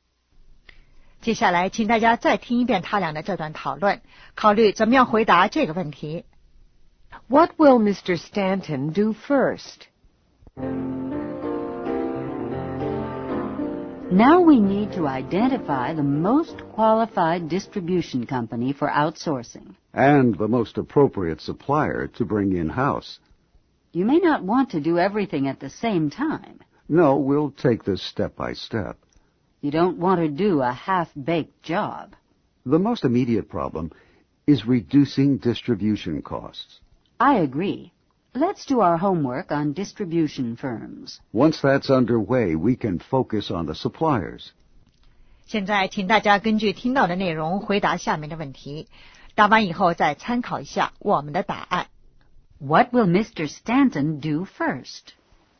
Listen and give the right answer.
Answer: Identify top candidates for distributing the computers.